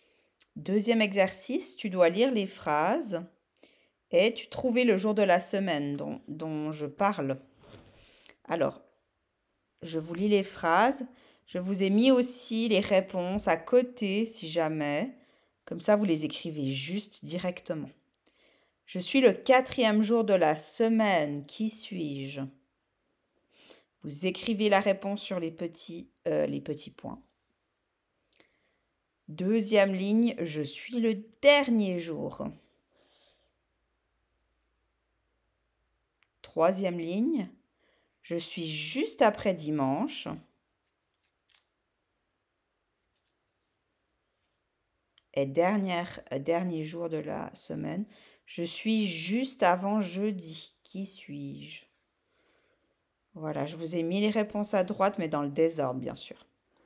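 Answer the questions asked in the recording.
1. jeudi
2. dimanche
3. lundi
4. mercredi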